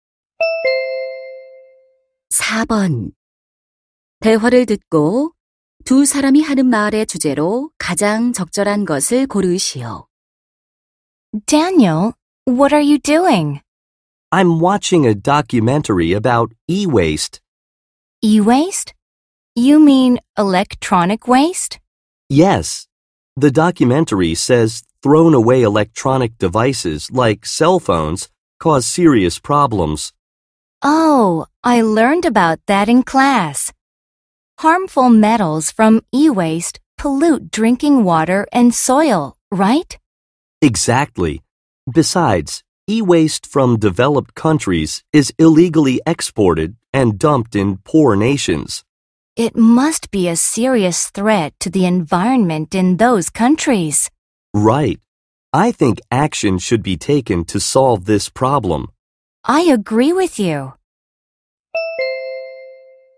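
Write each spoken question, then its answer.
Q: 대화를 듣고 두 사람이 하는 말의 주제로 가장 적절한 것을 고르시오.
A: 전자 폐기물로 인한 문제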